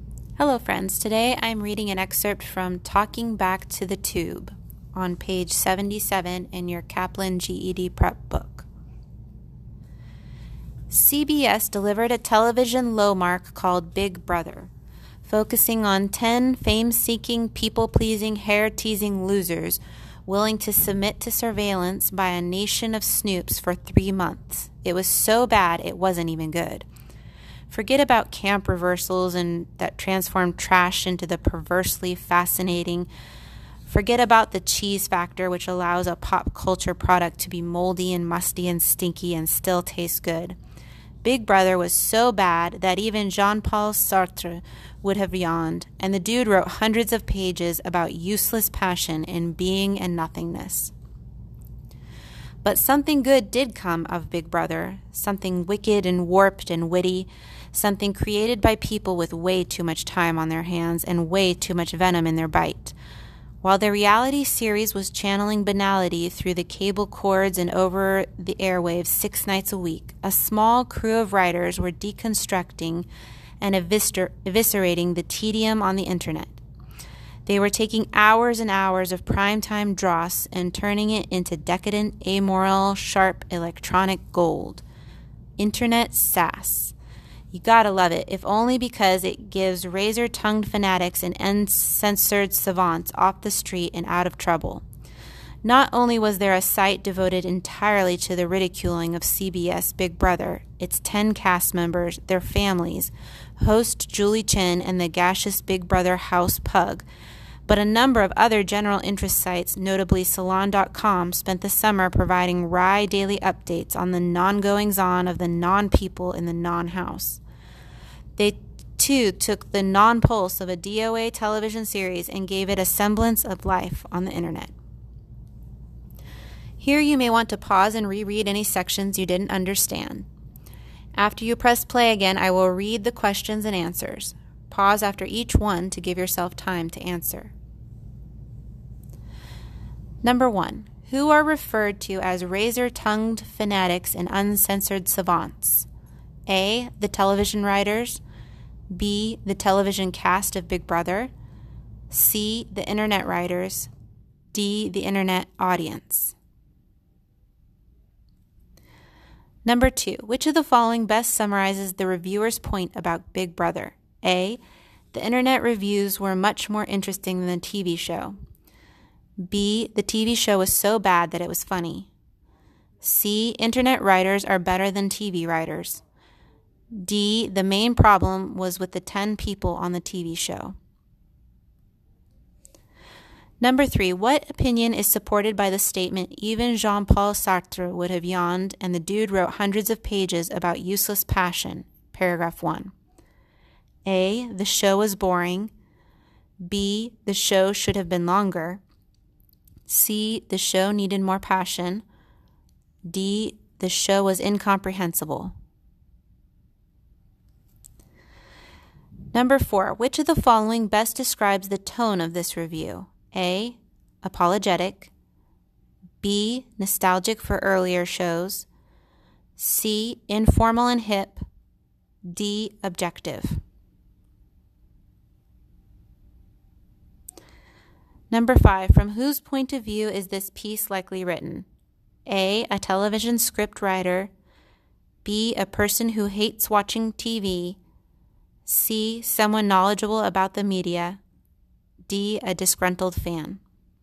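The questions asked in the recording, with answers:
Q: Who are referred to as razor-tongued fanatics and uncensored savants?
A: C: The internet writers.

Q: Which of the following best summarizes the reviewer's point about Big Brother?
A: A: The internet reviews were much more interesting than the TV show.

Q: What opinion is supported by the statement, even Jean-Paul Sartre would have yawned and the dude wrote hundreds of pages about useless passion?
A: A: The show was boring.

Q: Which of the following best describes the tone of this review?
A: C: Informal and hip.

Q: From whose point of view is this piece likely written?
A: C: Someone knowledgeable about the media.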